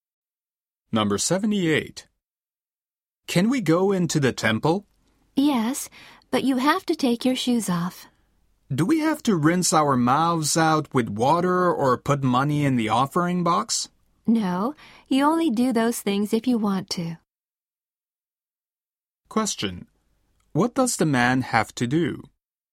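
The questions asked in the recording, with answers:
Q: What does the man have to do?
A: Take his shoes off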